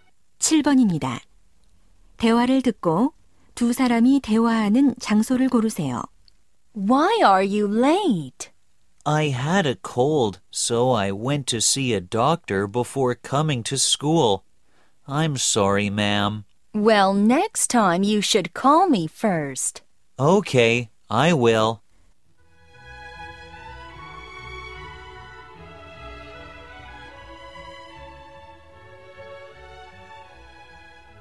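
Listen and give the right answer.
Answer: 학교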